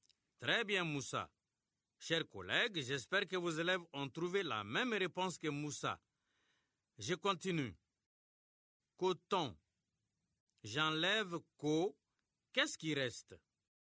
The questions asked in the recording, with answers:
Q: Coton. J'enlève co. Qu'est-ce qui reste?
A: Monsieur, il reste temps.